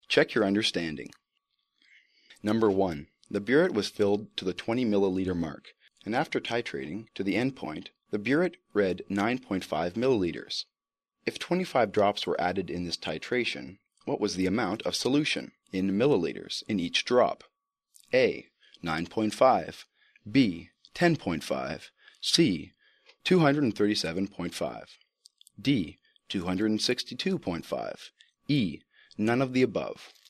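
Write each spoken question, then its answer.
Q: If 25 drops were added in this titration, what was the amount of solution in milliliters in each drop?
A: E: None of the above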